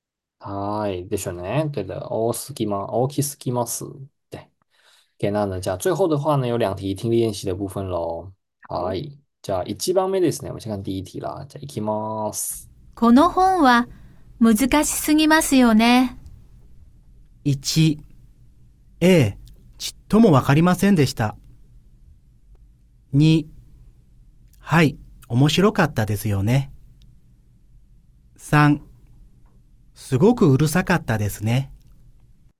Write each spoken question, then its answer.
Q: この本は難しすぎますよね。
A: 1番ですね、没错了。